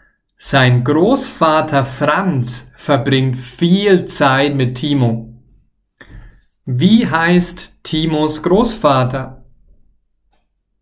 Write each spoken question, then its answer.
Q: Wie heißt Timos Großvater?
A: Franz. Timos Großvater heißt Franz.